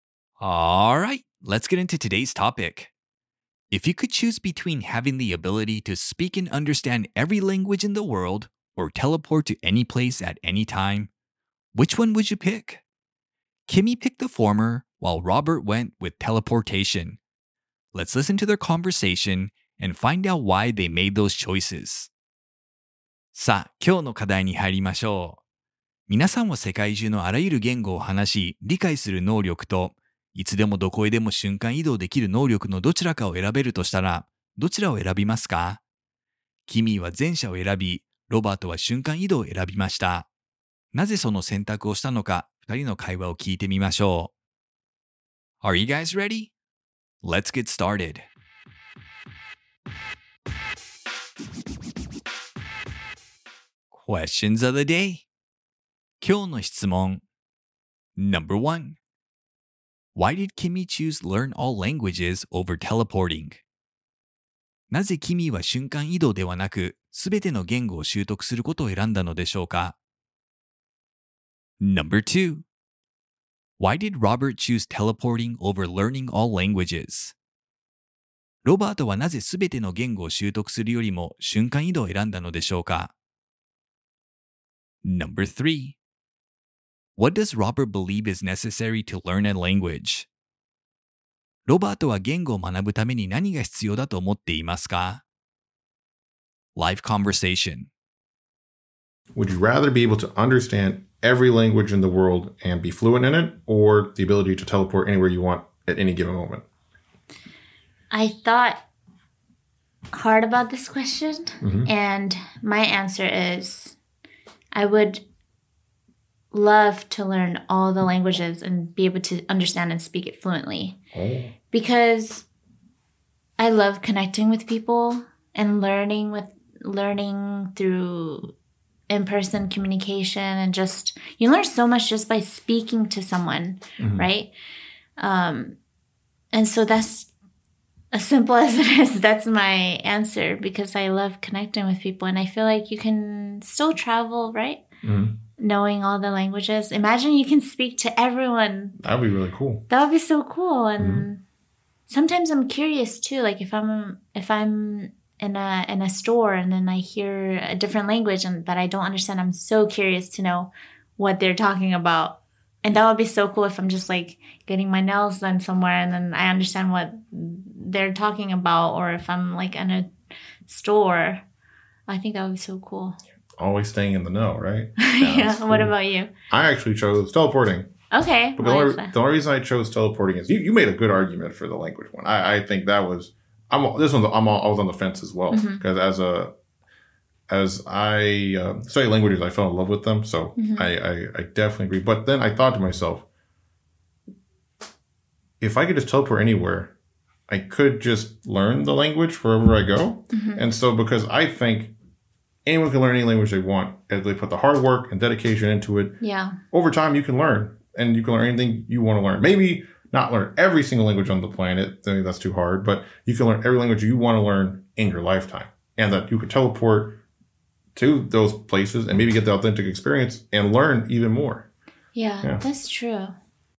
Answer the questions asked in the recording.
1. She thinks that one can travel on their own, and learning languages would allow her to communicate more effectively with others around the world.
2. He thinks that he could learn languages as he goes whenever he teleports to somewhere he wants to visit.
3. He thinks as long as someone puts hard work and dedication into it, anyone can learn a new language.